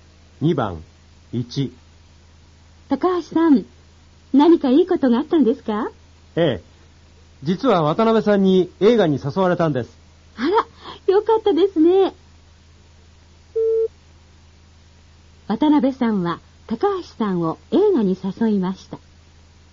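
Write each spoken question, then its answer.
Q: 渡辺さんは高橋さんを映画に誘いました。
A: 正しい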